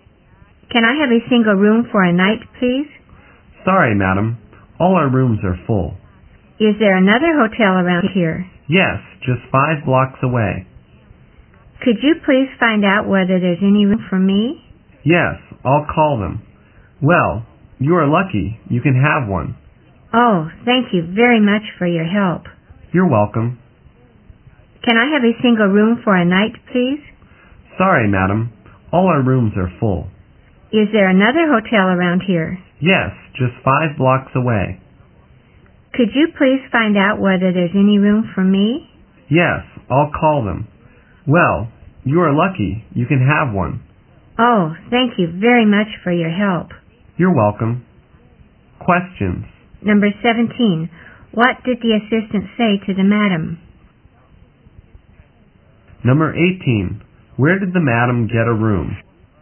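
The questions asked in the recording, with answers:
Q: What did the assistant say to the madam?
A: All their rooms were full

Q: Where did the madam get a room?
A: At another hotel 5 blocks away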